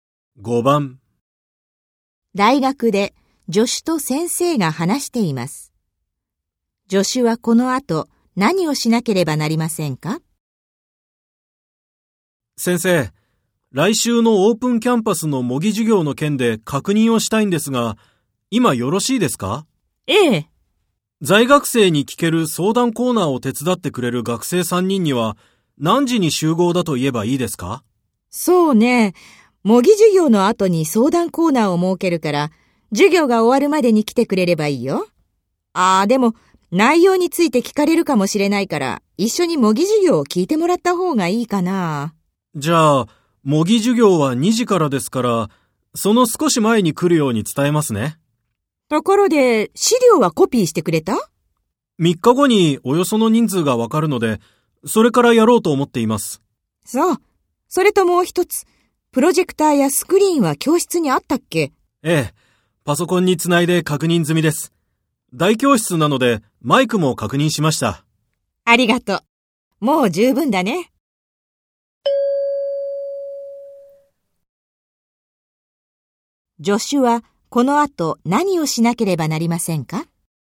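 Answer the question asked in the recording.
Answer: 手伝いの学生3人に、模擬授業が始まる2時の少し前に来るよう伝える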